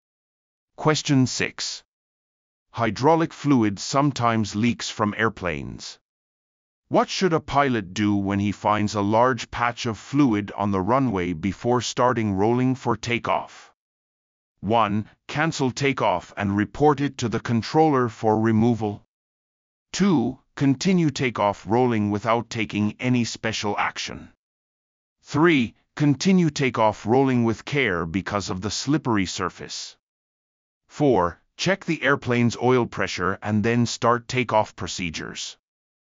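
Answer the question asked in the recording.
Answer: 1: Cancel takeoff and report it to the controller for removal.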